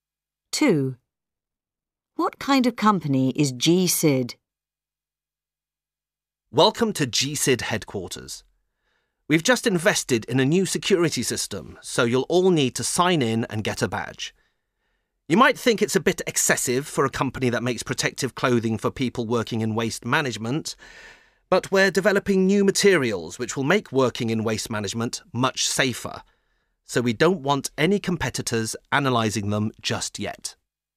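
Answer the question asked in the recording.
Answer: It makes protective clothing for people working in waste management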